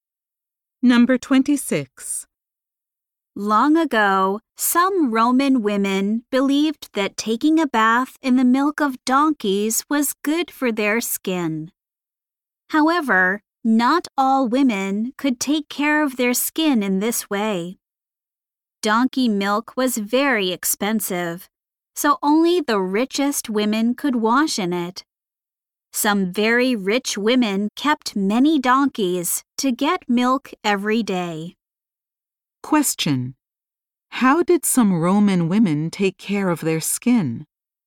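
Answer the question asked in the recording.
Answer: They bathed in donkey milk.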